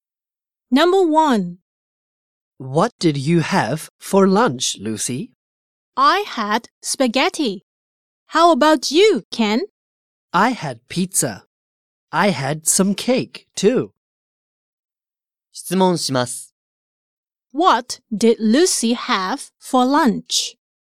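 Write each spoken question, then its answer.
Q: What did Lucy have for lunch?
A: Spaghetti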